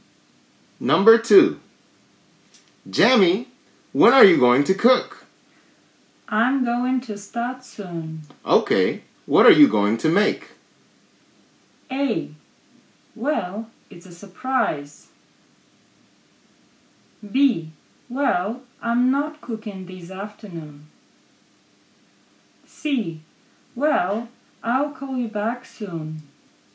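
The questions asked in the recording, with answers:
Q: Okay, what are you going to make?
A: A: Well, it's a surprise.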